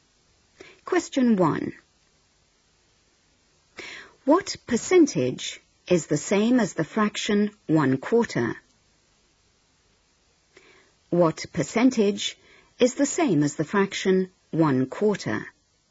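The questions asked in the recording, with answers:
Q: What percentage is the same as the fraction 1/4?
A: 25%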